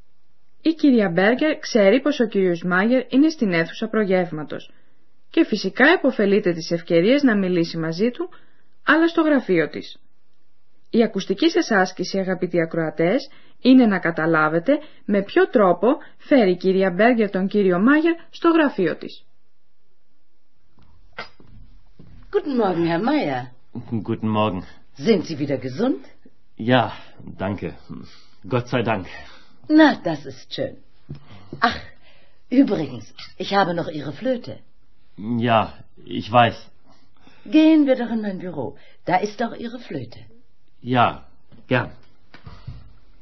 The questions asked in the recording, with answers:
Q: Η ακουστική σας άσκηση, αγαπητοί ακροατές, είναι να καταλάβετε με ποιο τρόπο φέρει η κυρία Μπέργκερ τον κύριο Μάγερ στο γραφείο της.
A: Η κυρία Μπέγκερ, όπως ίσως θυμόσαστε, έχει το φλάουτο του κυρίου Μάγερ, φυλαγμένο στο γραφείο της.